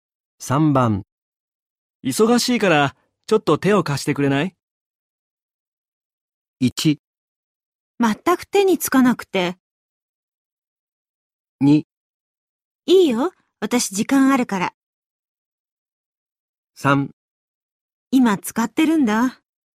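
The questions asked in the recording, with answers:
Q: 忙しいから、ちょっと手を貸してくれない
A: 2: いいよ。私時間あるから。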